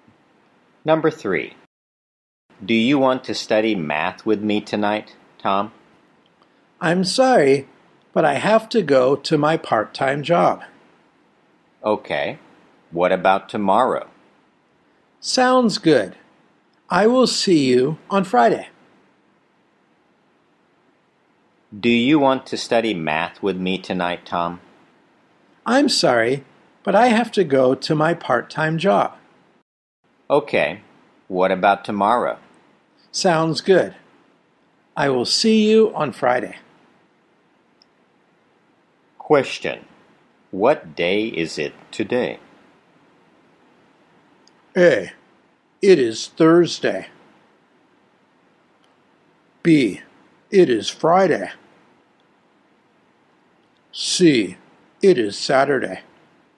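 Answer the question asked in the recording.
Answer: A: It is Thursday.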